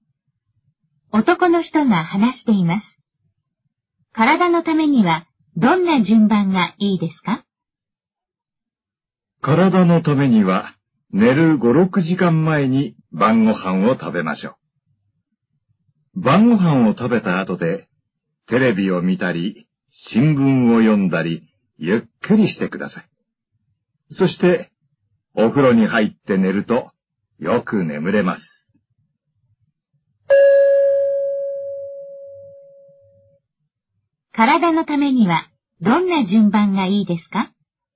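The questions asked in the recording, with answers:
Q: 体のためにはどんな順番がいいですか?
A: 晩ご飯を食べる→テレビを見たり新聞を読んだりしてゆっくりする→お風呂に入る→寝る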